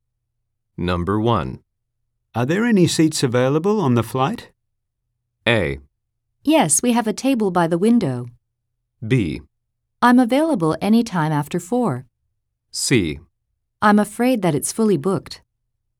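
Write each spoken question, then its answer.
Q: Are there any seats available on the flight?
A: C: I'm afraid that it's fully booked.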